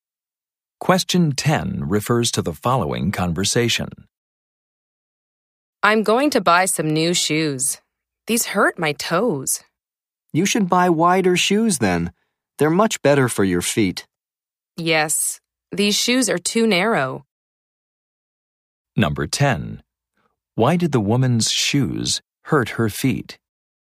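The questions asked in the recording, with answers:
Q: Why did the woman's shoes hurt her feet?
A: They are too narrow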